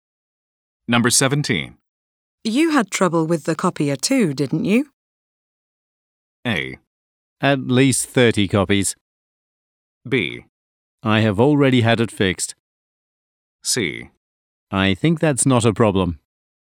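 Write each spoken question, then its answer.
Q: You had trouble with the copier too, didn't you?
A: B: I have already had it fixed.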